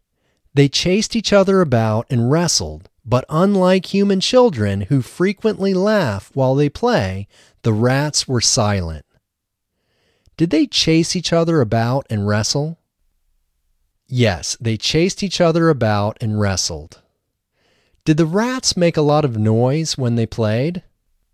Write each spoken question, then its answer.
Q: Did the rats make a lot of noise when they played?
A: No, the rats did not make a lot of noise when they played.